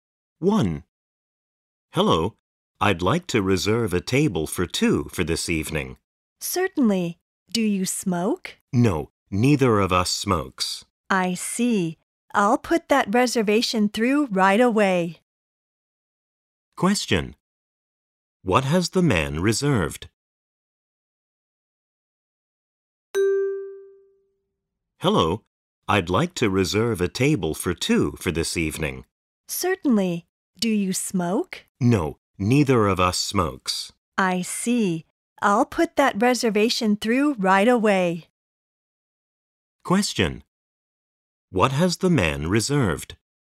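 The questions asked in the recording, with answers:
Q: What has the man reserved?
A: A non-smoking table for two for this evening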